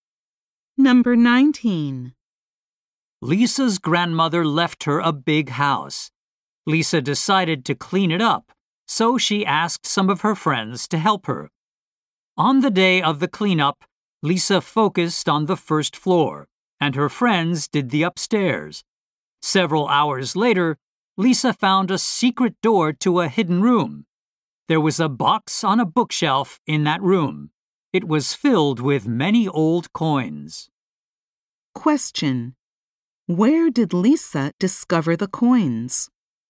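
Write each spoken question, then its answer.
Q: Where did Lisa discover the coins?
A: In a box on a bookshelf in a hidden room.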